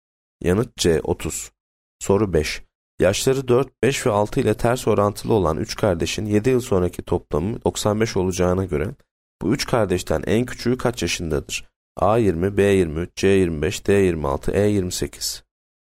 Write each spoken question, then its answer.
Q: Yaşları 4, 5 ve 6 ile ters orantılı olan 3 kardeşin 7 yıl sonraki toplamı 95 olacağına göre bu 3 kardeşten en küçüğü kaç yaşındadır?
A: Yanıt A 20.